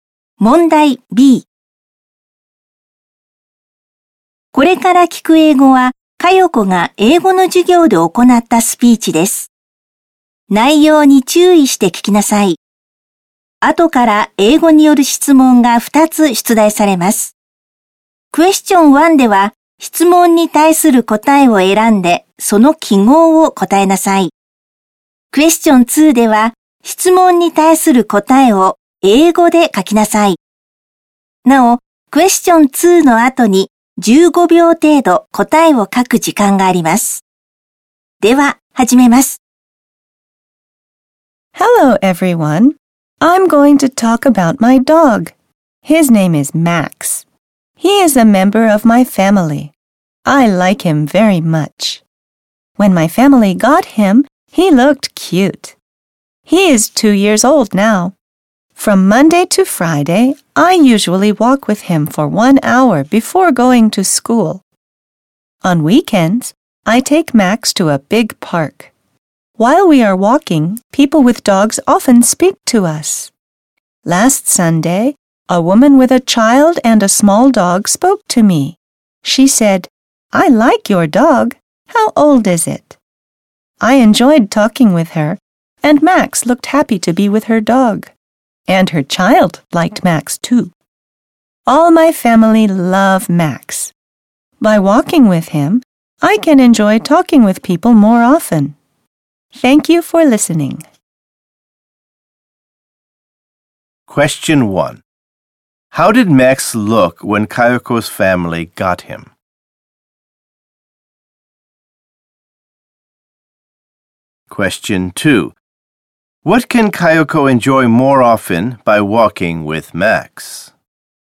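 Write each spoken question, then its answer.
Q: How did Max look when Kayako's family got him?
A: He looked cute

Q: What can Kayako enjoy more often by walking with Max?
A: Talking with people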